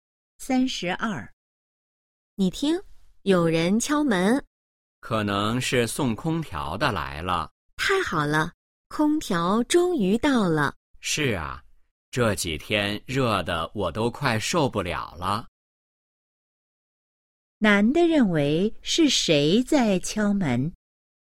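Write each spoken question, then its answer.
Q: 男的认为是谁在敲门?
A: 送空调的人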